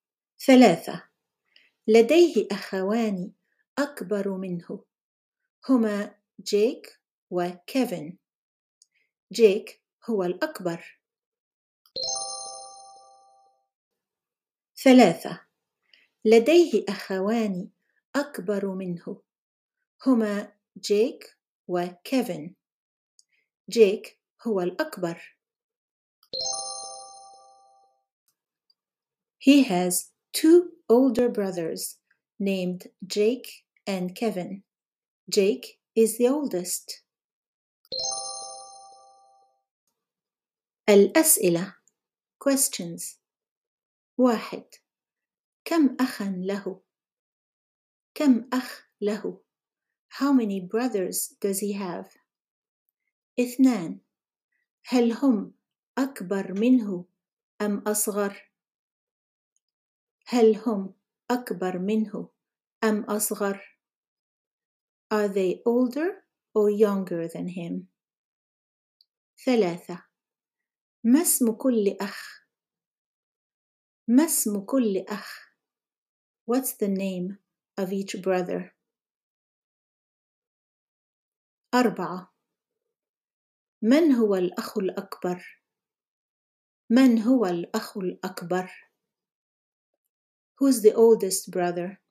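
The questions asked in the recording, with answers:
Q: كم أخا له؟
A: أخوان

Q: هل هم أكبر منه أم أصغر؟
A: أكبر منه

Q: ما اسم كل أخ؟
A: جيك وكيفن

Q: من هو الأخ الأكبر؟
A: جيك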